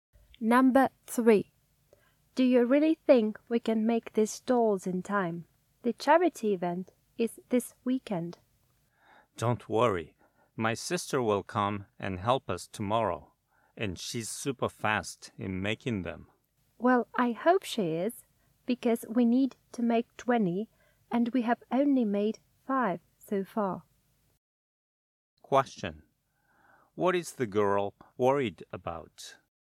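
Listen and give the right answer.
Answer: Whether they can make the 20 dolls in time for the charity event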